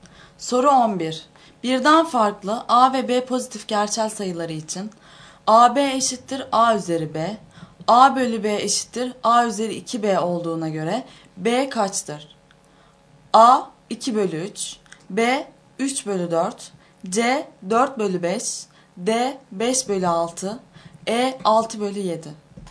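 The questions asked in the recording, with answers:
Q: Birden farklı A ve B pozitif gerçel sayıları için AB eşittir A üzeri B, A bölü B eşittir A üzeri 2B olduğuna göre B kaçtır?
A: A: 2 bölü 3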